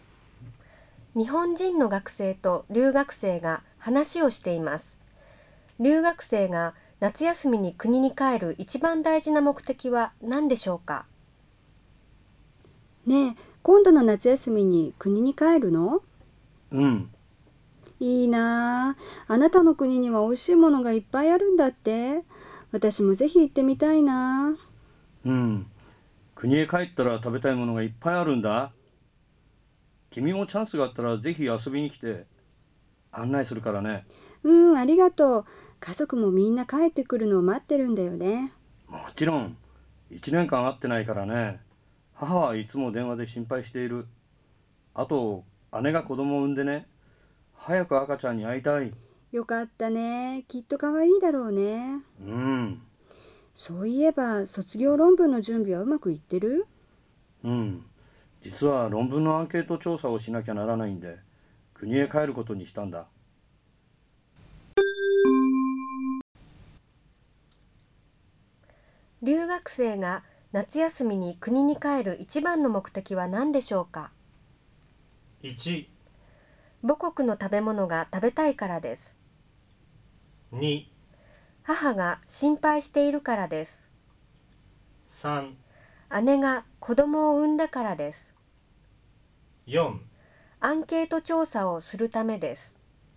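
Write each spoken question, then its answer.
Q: 留学生が夏休みに国に帰る一番の目的は何でしょうか?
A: 4: アンケート調査をするためです。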